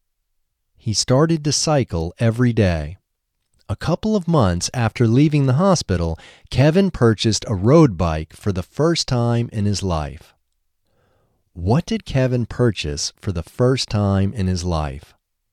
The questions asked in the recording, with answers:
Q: What did Kevin purchase for the first time in his life?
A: Kevin purchased a road bike for the first time in his life.